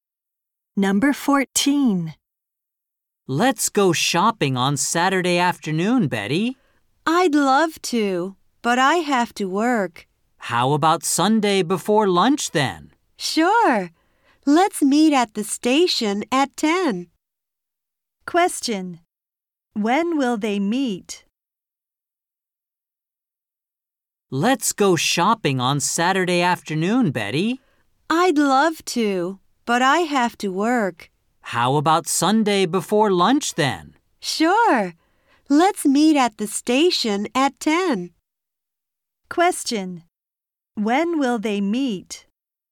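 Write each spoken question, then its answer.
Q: When will they meet?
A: At 10 on Sunday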